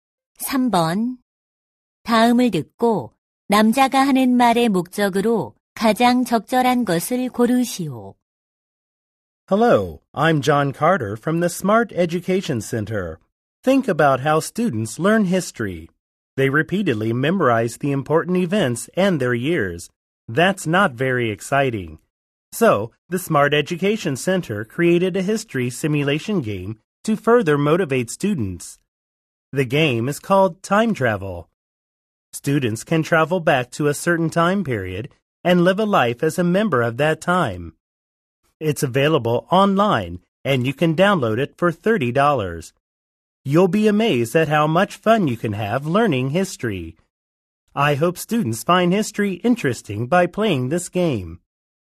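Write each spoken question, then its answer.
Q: 다음을 듣고 남자가 하는 말의 목적으로 가장 적절한 것을 고르시오.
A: 역사 학습용 시뮬레이션 게임 'Time Travel'을 홍보하려고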